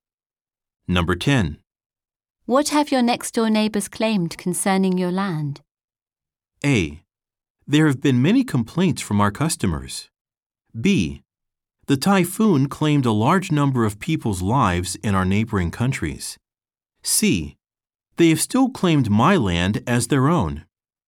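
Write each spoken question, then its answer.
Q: What have your next-door neighbors claimed concerning your land?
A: C: They have still claimed my land as their own.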